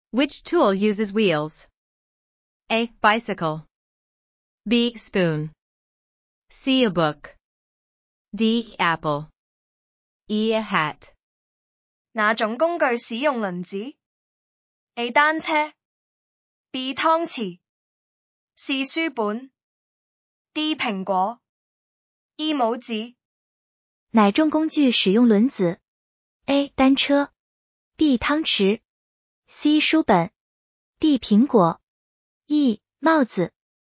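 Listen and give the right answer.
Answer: A: Bicycle.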